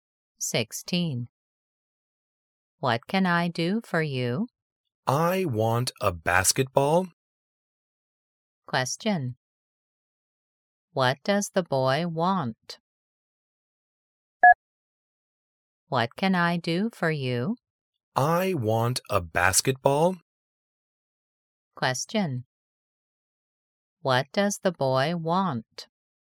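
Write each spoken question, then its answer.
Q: What does the boy want?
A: A basketball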